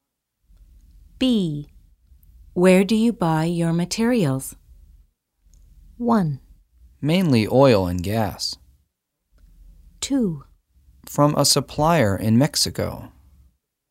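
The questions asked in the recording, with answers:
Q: Where do you buy your materials?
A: 2: From a supplier in Mexico.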